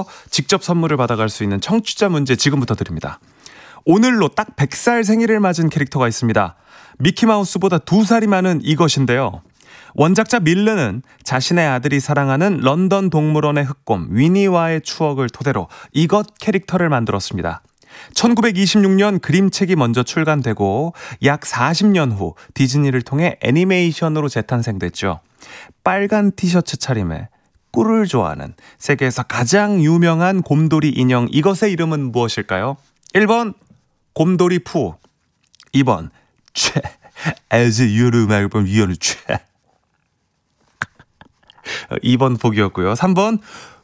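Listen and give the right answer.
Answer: 1: 곰돌이 푸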